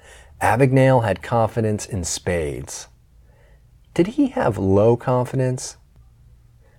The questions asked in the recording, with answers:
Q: Did he have low confidence?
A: No, he didn't have low confidence.